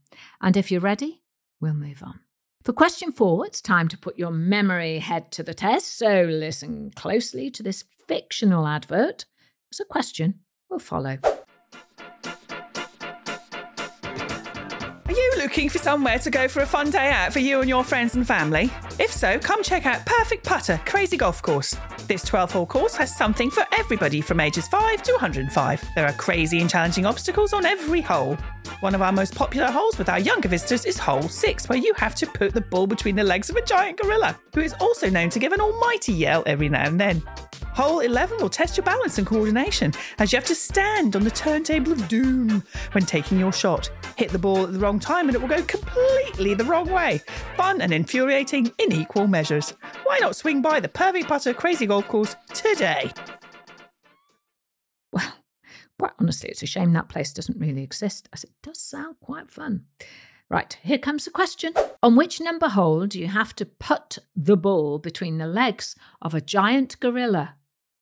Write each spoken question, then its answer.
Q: On which number hole do you have to put the ball between the legs of a giant gorilla?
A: Well, it was hole number 6.